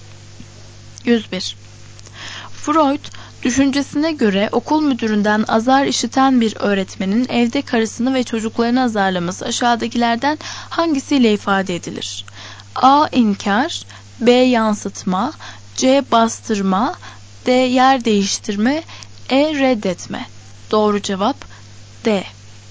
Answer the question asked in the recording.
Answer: Doğru cevap D.